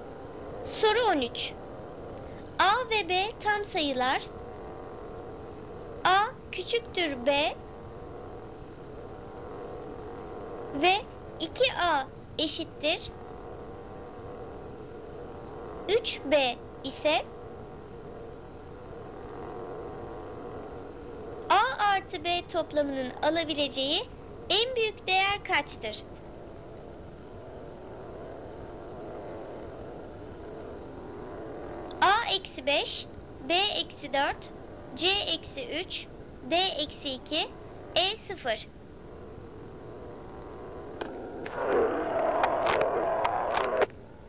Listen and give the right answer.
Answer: Doğru cevap A-5.